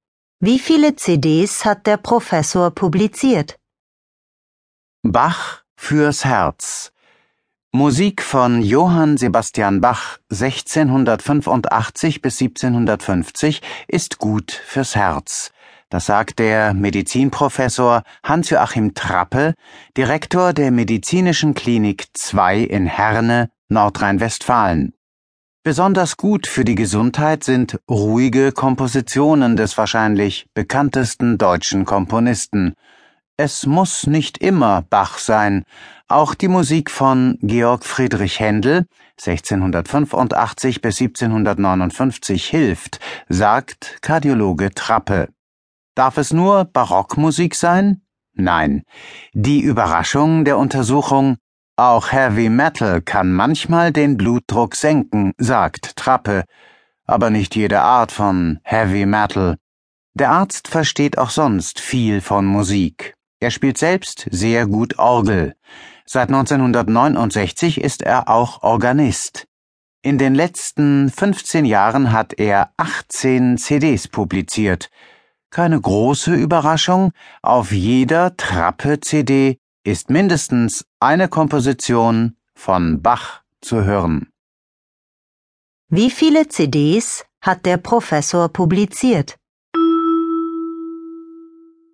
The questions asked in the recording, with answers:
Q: Wie viele CDs hat der Professor publiziert?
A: Er hat 18 CDs publiziert.